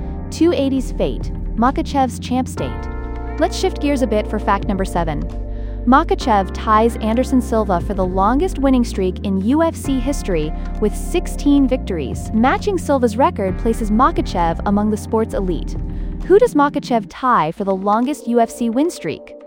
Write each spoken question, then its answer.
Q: Who does Makhachev tie for the longest UFC win streak?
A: Anderson Silva.